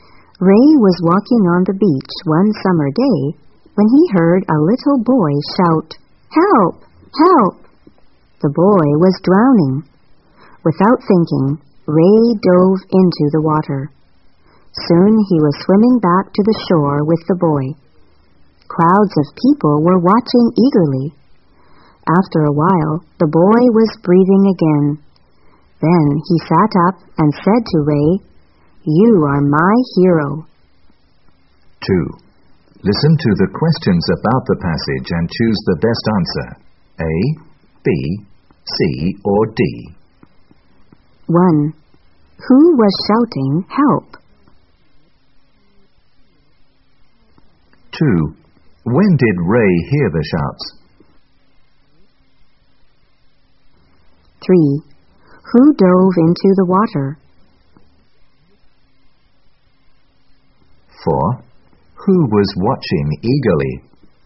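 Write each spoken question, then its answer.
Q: Who was shouting, "Help"?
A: A little boy

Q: When did Ray hear the shouts?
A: One summer day, while walking on the beach

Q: Who dove into the water?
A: Ray

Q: Who was watching eagerly?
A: Crowds of people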